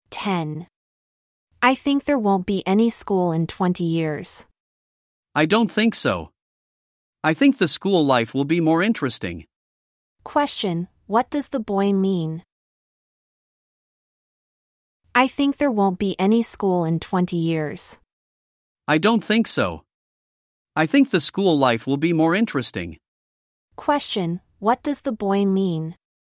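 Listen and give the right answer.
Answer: There will still be schools, and school life will be more interesting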